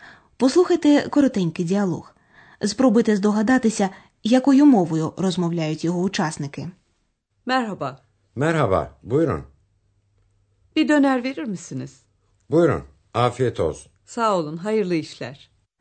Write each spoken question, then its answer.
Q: Спробуйте здогадатися, якою мовою розмовляють його учасники.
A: Це була турецька.